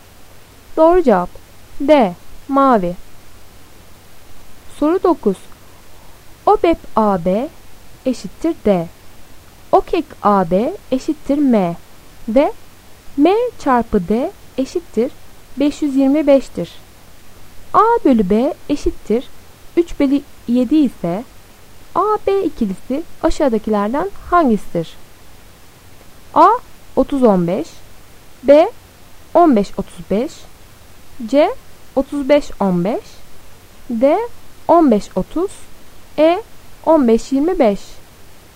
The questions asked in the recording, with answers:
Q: A bölü B eşittir 3 bölü 7 ise A B ikilisi aşağıdakilerden hangisidir?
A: Doğru cevap B 15-35.